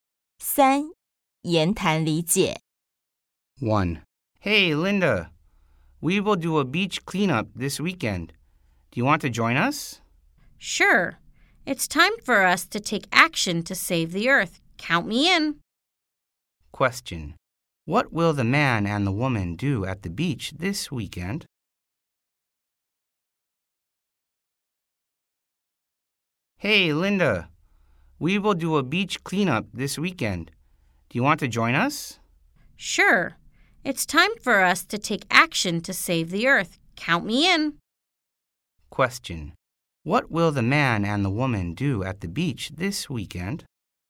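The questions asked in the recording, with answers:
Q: What will the man and the woman do at the beach this weekend?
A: Clean up the beach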